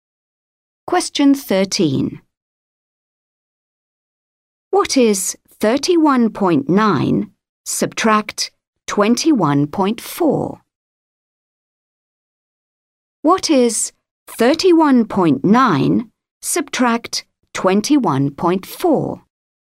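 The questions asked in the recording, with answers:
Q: What is 31.9 subtract 21.4?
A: 10.5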